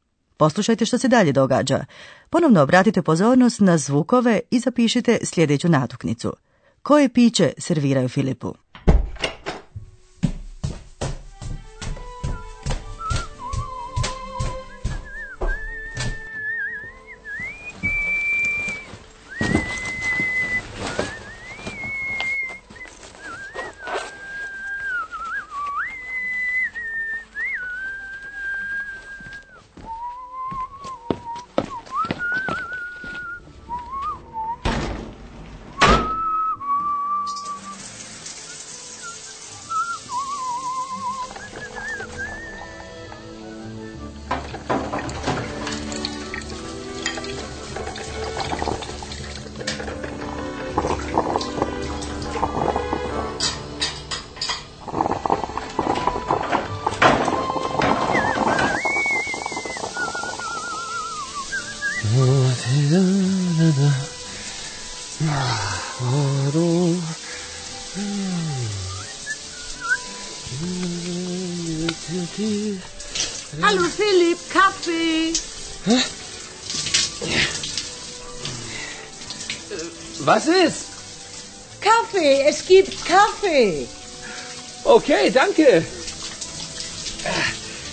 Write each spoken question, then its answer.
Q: Koje piće serviraju Filipu?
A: a onda ga Hane, tko god je to, poslužuje kavom.